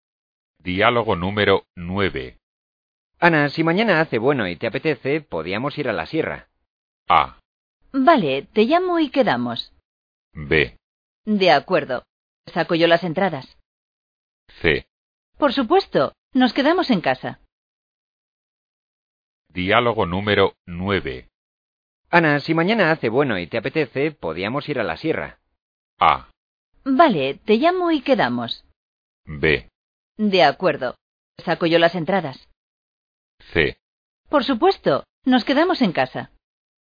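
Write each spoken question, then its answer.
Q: Ana, si mañana hace bueno y te apetece, podíamos ir a la sierra.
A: A: Vale, te llamo y quedamos.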